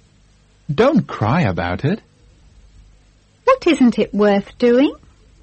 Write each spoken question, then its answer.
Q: What isn't it worth doing?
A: It isn't worth crying about.